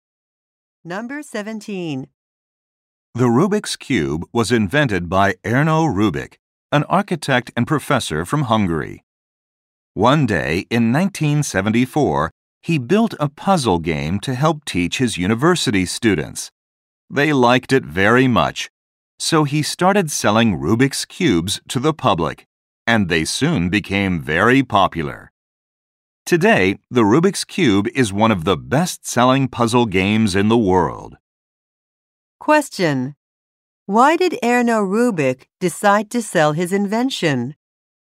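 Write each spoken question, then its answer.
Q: Why did Erno Rubik decide to sell his invention?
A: His students liked it very much.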